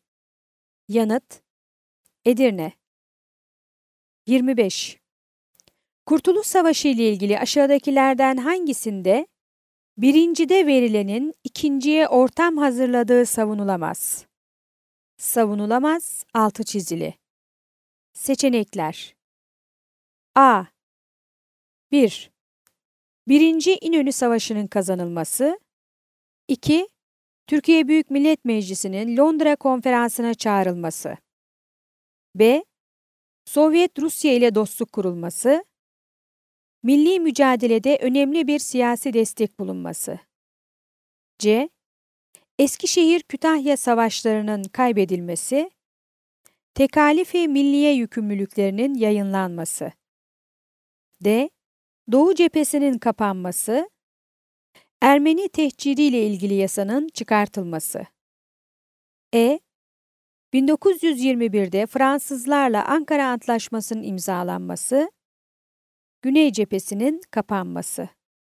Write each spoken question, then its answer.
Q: Kurtuluş Savaşı ile ilgili aşağıdakilerden hangisinde birincide verilenin ikinciye ortam hazırladığı savunulamaz?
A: Yanıt: Diyarbakır.